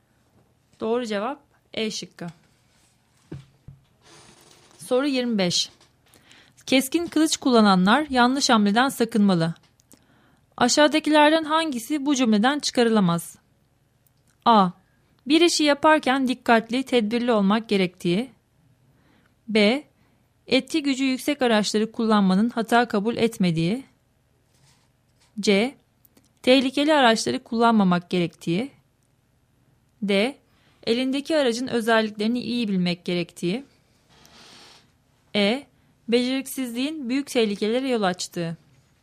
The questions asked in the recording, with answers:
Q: Aşağıdakilerden hangisi bu cümleden çıkarılamaz?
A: Doğru cevap C şıkkı.